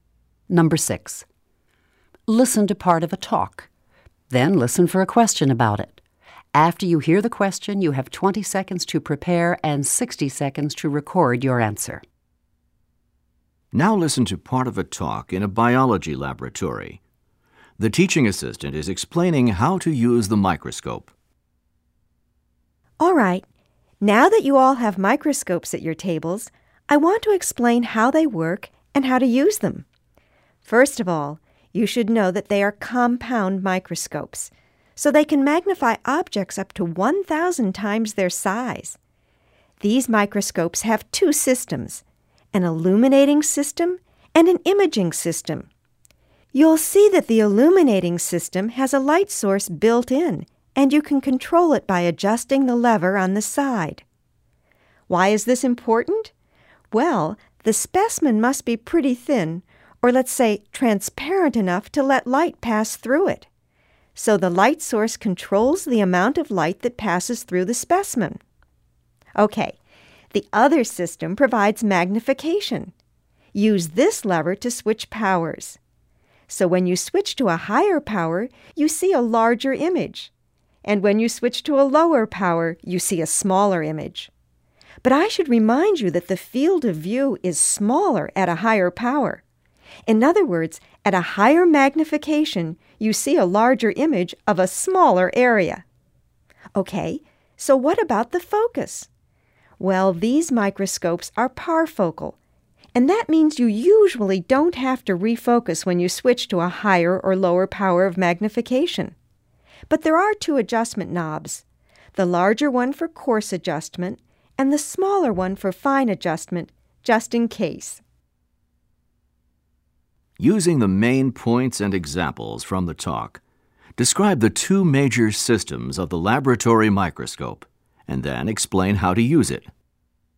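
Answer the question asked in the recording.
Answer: The illuminating system has a built-in light, controlled by a lever, that passes light through a thin specimen. The imaging system magnifies up to 1,000 times; a lever switches powers, and higher power gives a larger image of a smaller area. The microscopes are parfocal, so refocusing is usually unnecessary, but there are coarse and fine adjustment knobs.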